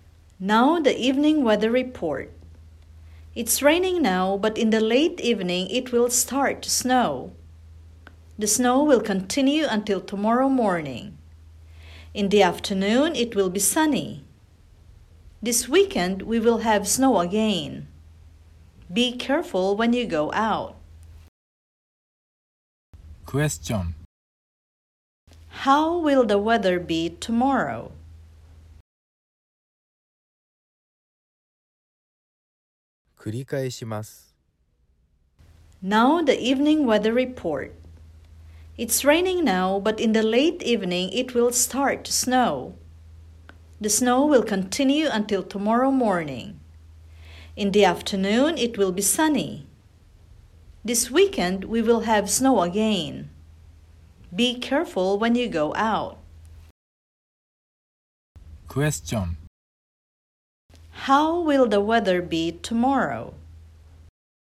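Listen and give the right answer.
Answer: Snowy in the morning, then sunny in the afternoon.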